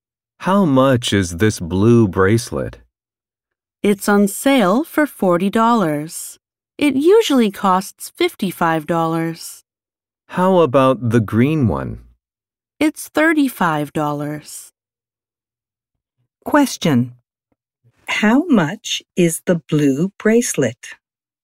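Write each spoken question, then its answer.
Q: How much is the blue bracelet?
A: $40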